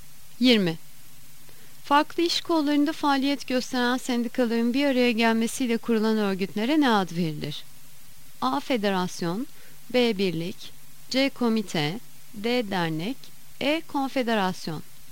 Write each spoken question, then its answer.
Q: Farklı iş kollarında faaliyet gösteren sendikaların bir araya gelmesiyle kurulan örgütlere ne ad verilir?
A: Yanıt E. Konfederasyon.